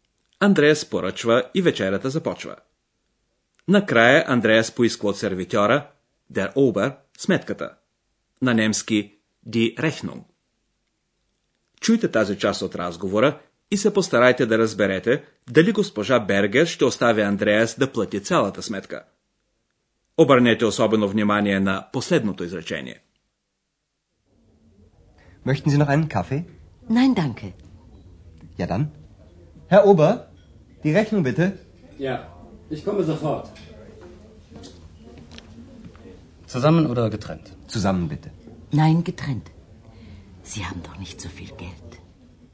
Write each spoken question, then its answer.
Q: Чуйте тази част от разговора и се постарайте да разберете дали госпожа Бергер ще остави Андреас да плати цялата сметка.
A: Госпожа Бергер иска да плати своята част от общата сметка.